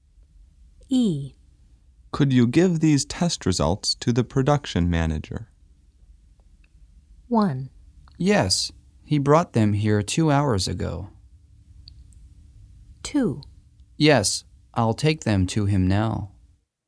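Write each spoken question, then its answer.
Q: Could you give these test results to the production manager?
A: 2: Yes, I'll take them to him now.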